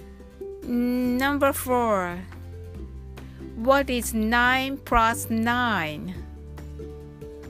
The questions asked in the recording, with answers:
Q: What is 9 plus 9?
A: Equals 18.